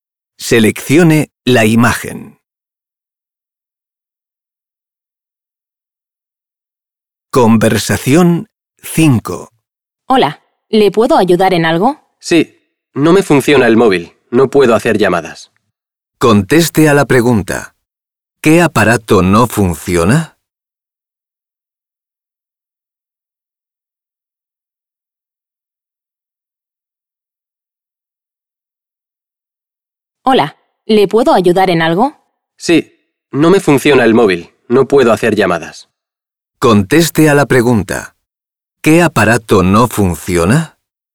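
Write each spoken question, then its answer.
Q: ¿Qué aparato no funciona?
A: El móvil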